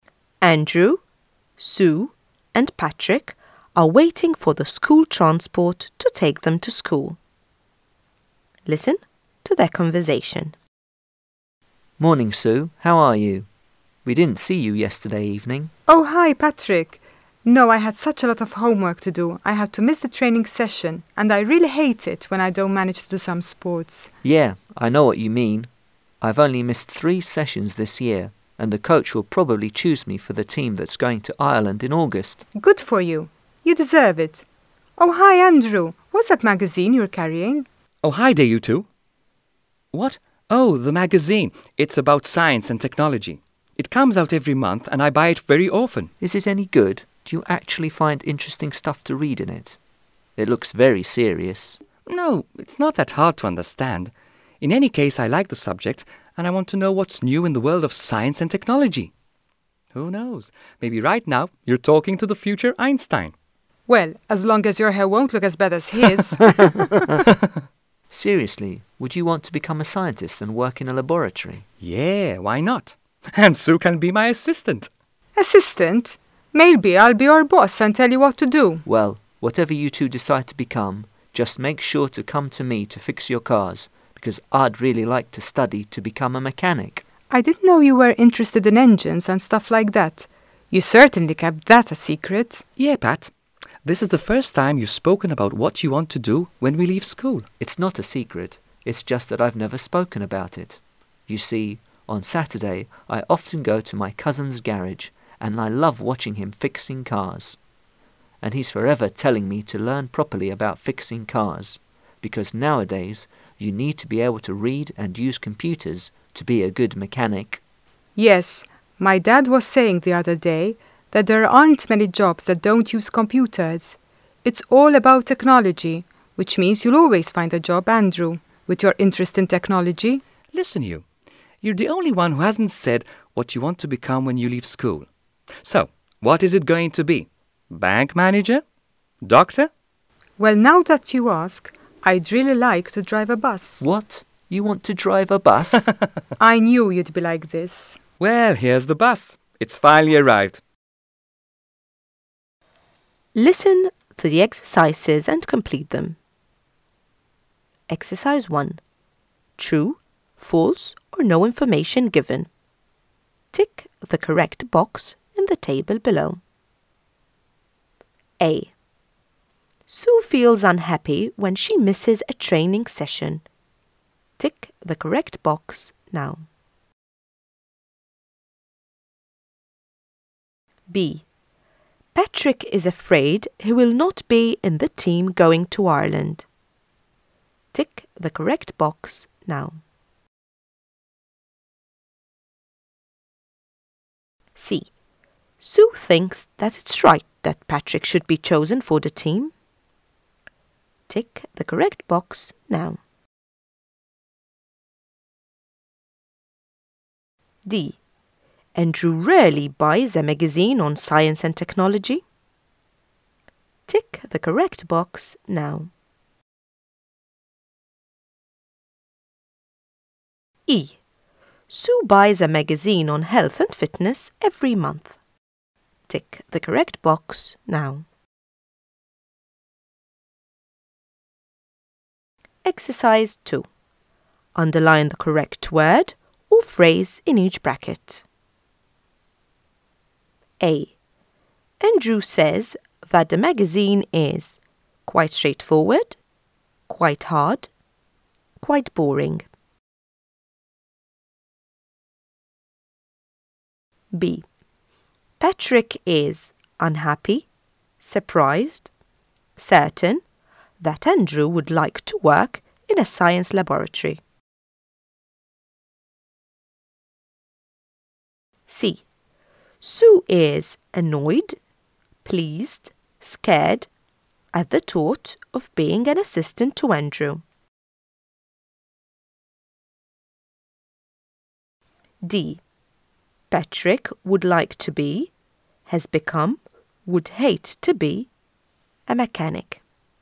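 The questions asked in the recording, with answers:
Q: Sue feels unhappy when she misses a training session.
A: True

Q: Patrick is afraid he will not be in the team going to Ireland.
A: False

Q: Sue thinks that it's right that Patrick should be chosen for the team.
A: True

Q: Andrew rarely buys a magazine on science and technology.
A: False

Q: Sue buys a magazine on health and fitness every month.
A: No information given

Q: Andrew says that the magazine is quite straightforward, quite hard, quite boring.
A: quite straightforward

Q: Patrick would like to be, has become, would hate to be, a mechanic.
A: would like to be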